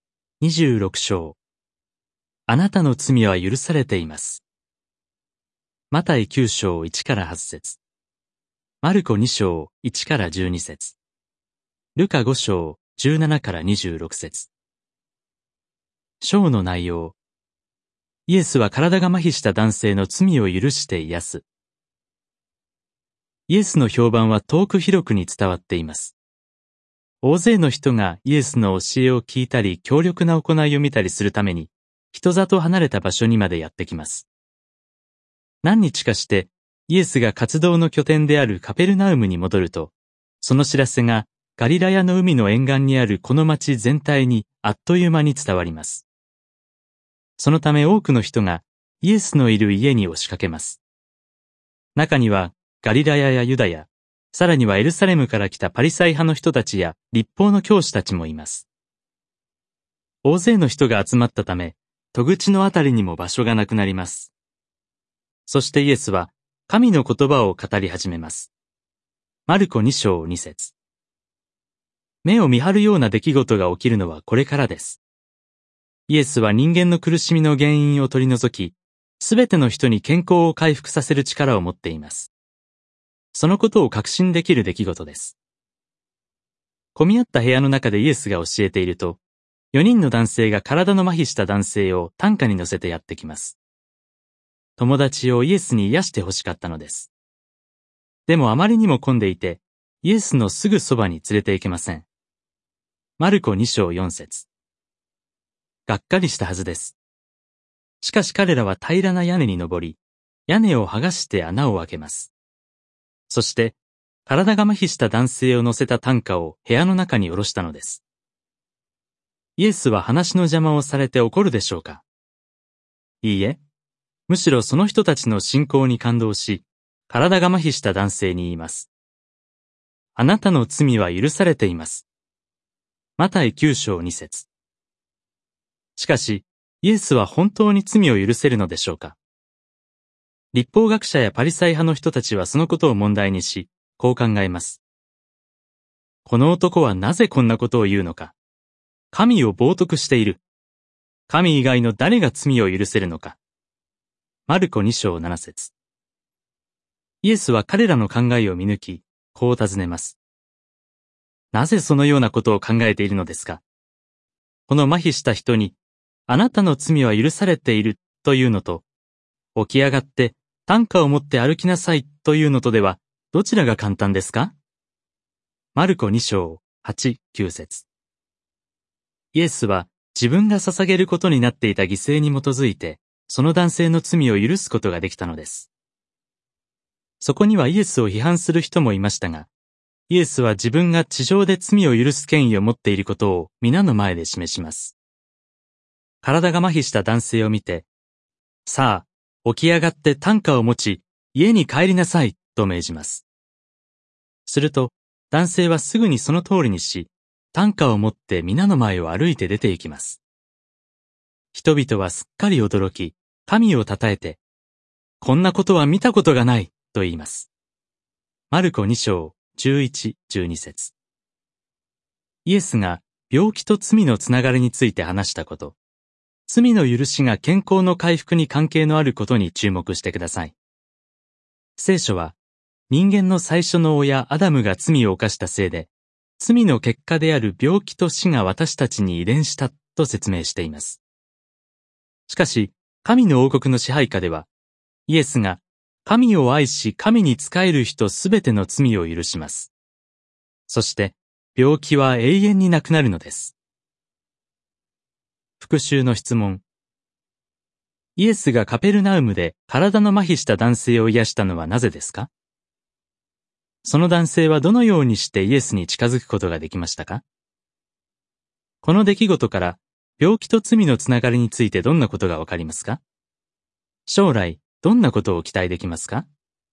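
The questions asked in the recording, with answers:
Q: その男性はどのようにしてイエスに近づくことができましたか?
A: 4人の友達が屋根に穴を開け、担架ごと部屋の中に下ろした

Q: この出来事から病気と罪のつながりについてどんなことがわかりますか?将来どんなことを期待できますか?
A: 病気は罪の結果であり、罪が許されると健康が回復する。神の王国ではイエスが罪を許し、病気は永遠になくなる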